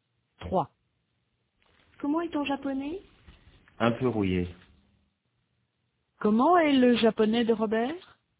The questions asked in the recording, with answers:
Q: Comment est le japonais de Robert?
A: Un peu rouillé.